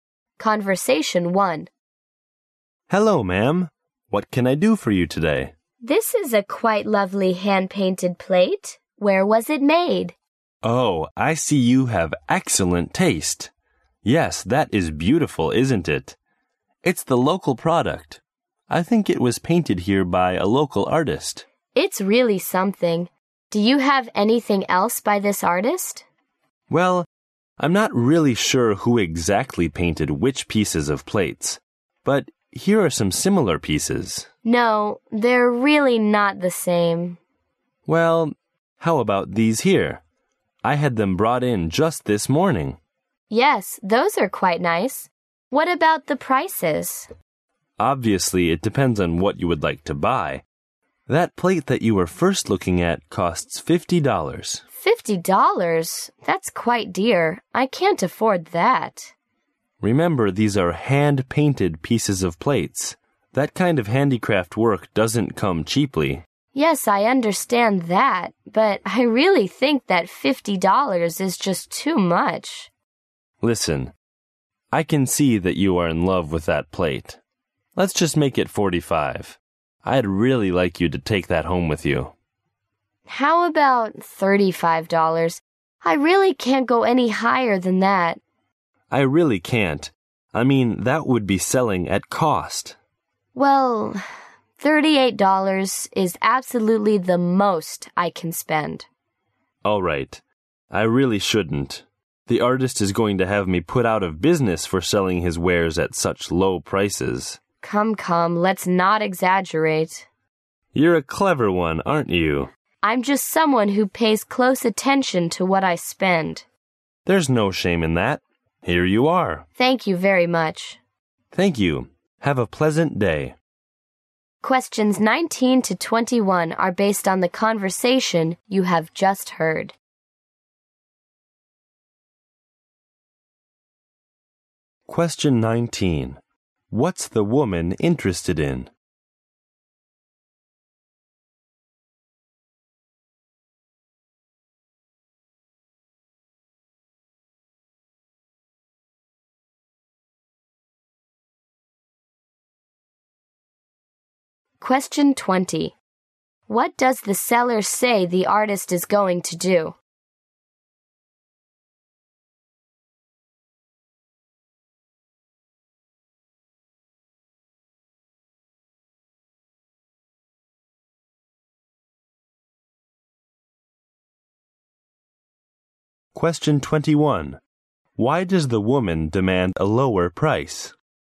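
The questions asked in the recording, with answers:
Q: What's the woman interested in?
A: A hand-painted plate

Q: What does the seller say the artist is going to do?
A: Put him out of business for selling his work so cheaply

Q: Why does the woman demand a lower price?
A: She can't afford $50; she pays close attention to what she spends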